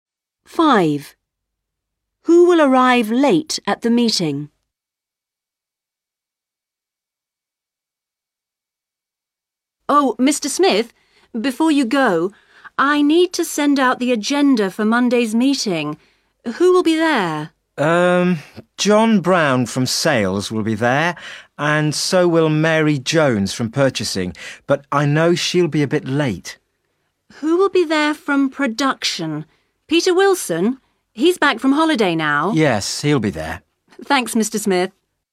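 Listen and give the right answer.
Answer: Mary Jones from purchasing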